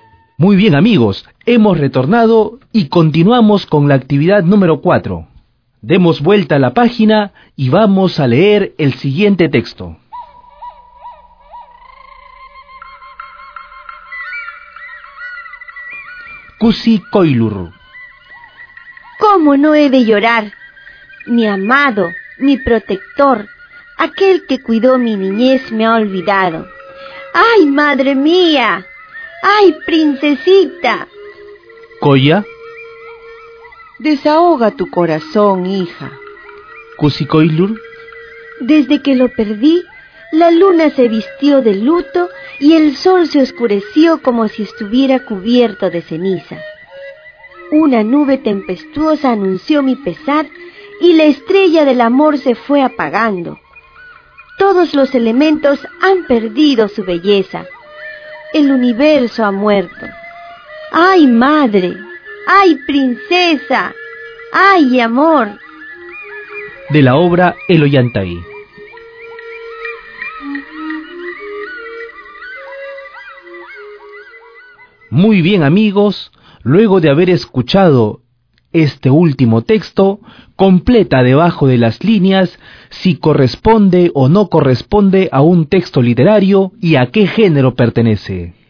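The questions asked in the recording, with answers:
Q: completa debajo de las líneas si corresponde o no corresponde a un texto literario y a qué género pertenece.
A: Texto literario, género dramático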